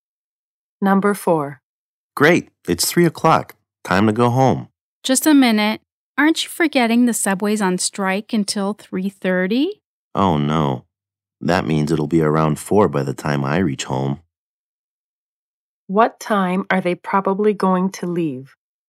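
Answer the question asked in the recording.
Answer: At 3:30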